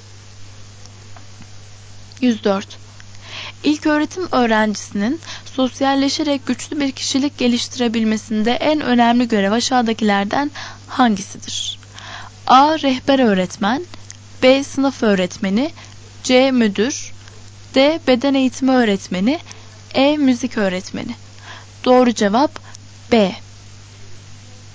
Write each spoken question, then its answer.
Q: İlköğretim öğrencisinin sosyalleşerek güçlü bir kişilik geliştirebilmesinde en önemli görev aşağıdakilerden hangisidir?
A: Doğru cevap B.